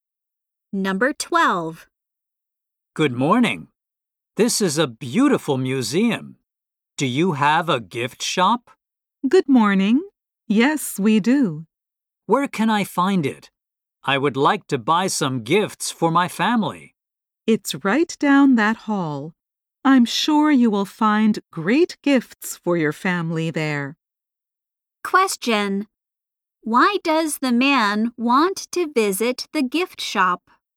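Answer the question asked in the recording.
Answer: To buy gifts for his family.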